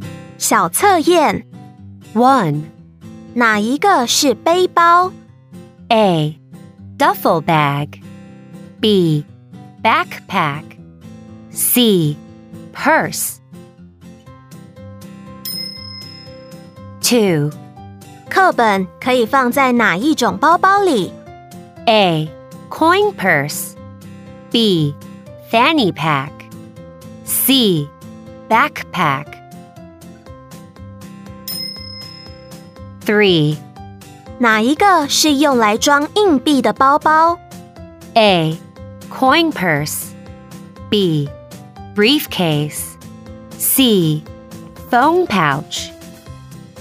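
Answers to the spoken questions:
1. B: Backpack
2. C: Backpack
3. A: Coin purse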